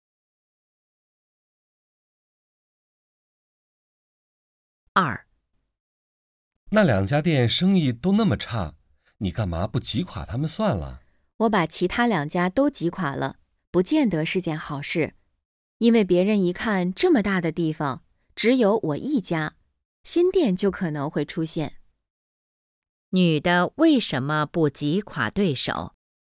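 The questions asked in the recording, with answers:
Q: 女的为什么不挤垮对手?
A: 怕挤垮其他两家后,新店可能会出现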